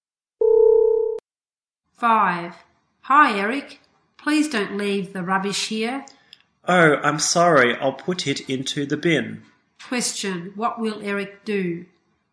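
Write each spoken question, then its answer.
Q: Question, what will Eric do?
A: Put the rubbish into the bin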